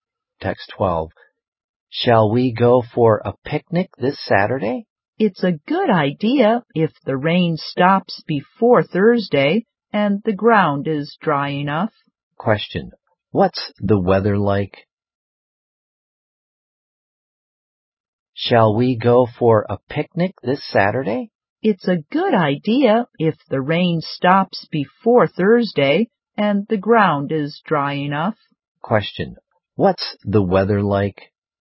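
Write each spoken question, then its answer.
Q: What's the weather like?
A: It's rainy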